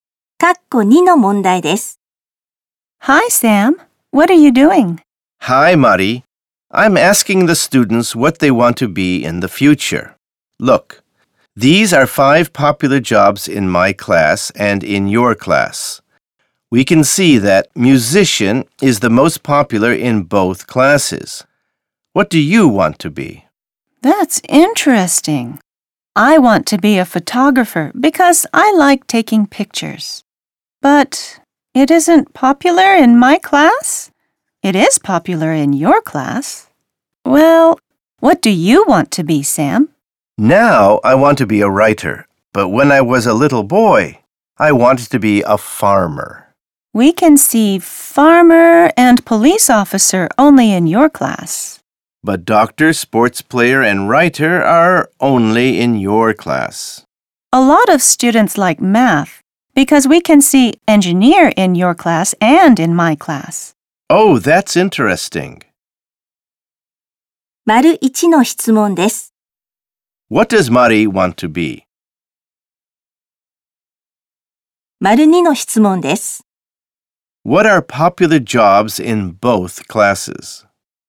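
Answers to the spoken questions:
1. A photographer
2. Musician and engineer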